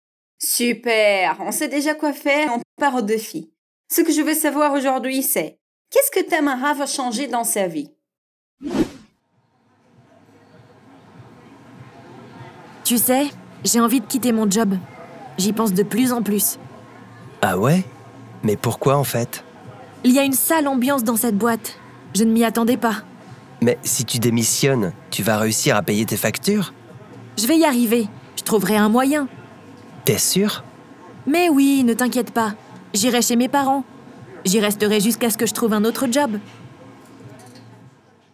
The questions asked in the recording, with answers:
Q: qu'est-ce que Tamara va changer dans sa vie?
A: Tamara veut quitter son travail.